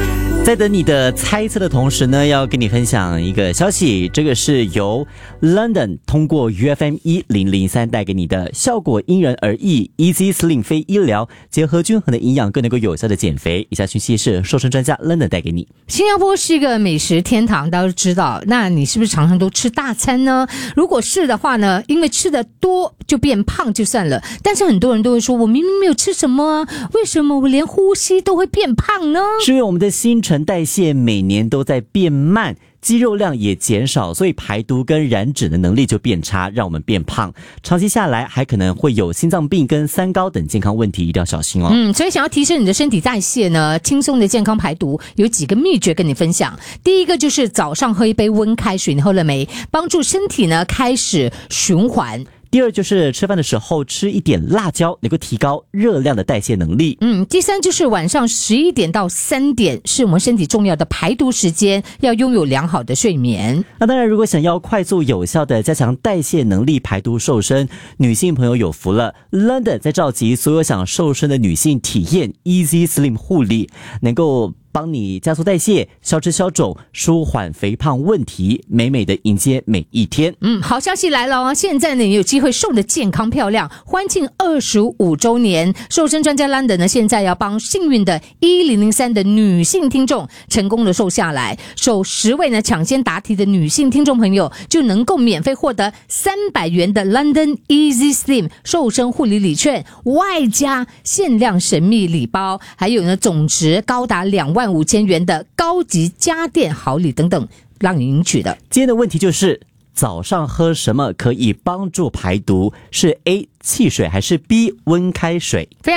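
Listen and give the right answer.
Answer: B: 温开水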